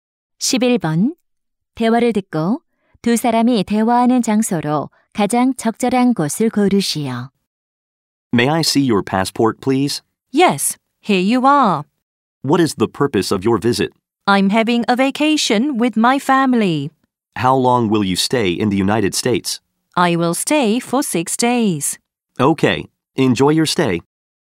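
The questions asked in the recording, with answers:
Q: 대화를 듣고 두 사람이 대화하는 장소로 가장 적절한 곳을 고르시오.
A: 공항 (입국 심사대)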